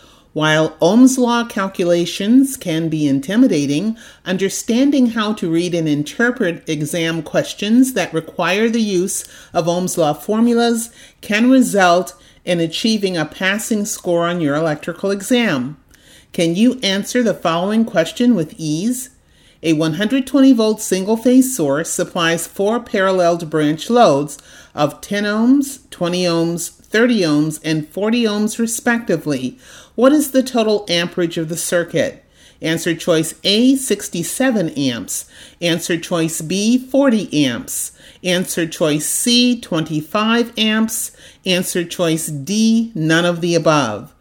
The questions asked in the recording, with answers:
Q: What is the total amperage of the circuit?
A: Solution, answer choice C, 25 amps.